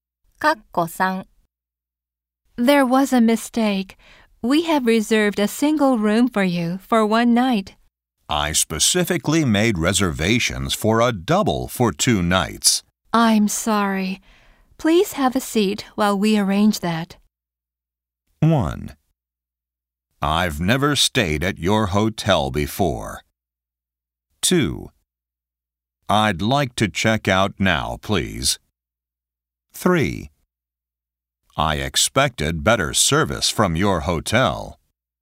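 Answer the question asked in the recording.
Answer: 3: I expected better service from your hotel.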